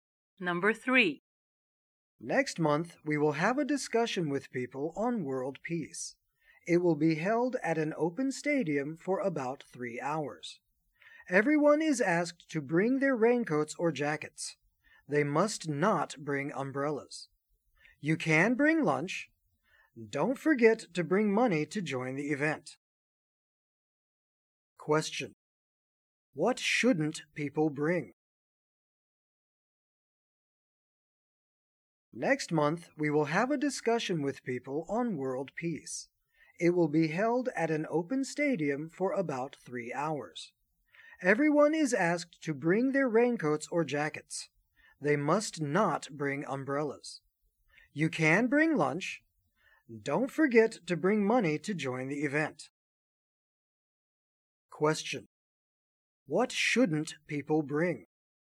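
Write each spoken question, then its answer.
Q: What shouldn't people bring?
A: Umbrellas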